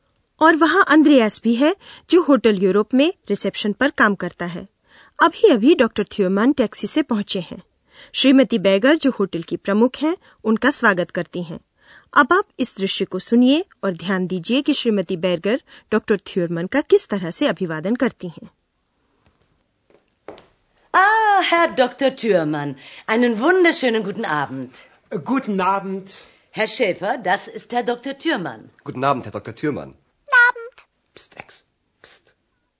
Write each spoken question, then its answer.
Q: ध्यान दीजिए कि श्रीमती bagger doctor थ्योरमन का किस तरह से अभिवादन करती हैं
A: यह काफी औपचारिक स्नेहपूर्ण अभिवादन था श्रीमती bagger ने doctor थ्योरमन का doctor कहकर अभिवादन किया और उनसे शुभ संध्या कहा